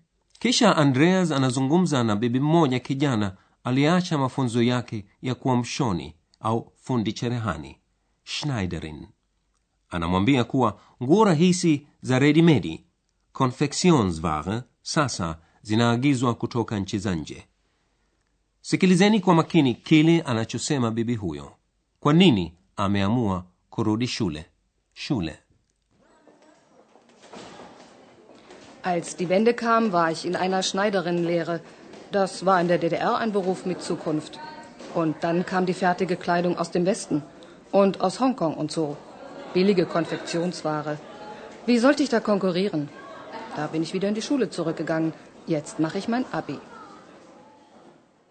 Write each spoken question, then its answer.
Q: Sikilizeni kwa makini kile anachosema bibi huyo, kwa nini ameamua kurudi shule shule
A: Anasema asingeweza kushindana kibiashara na nguo hizo rahisi za redimedi.